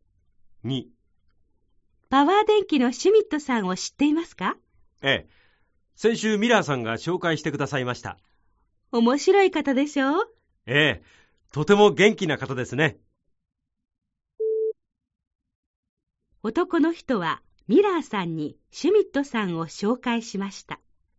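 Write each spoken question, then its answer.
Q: 男の人はミラーさんにシュミットさんを紹介しました。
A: ×(ミラーさんが紹介した)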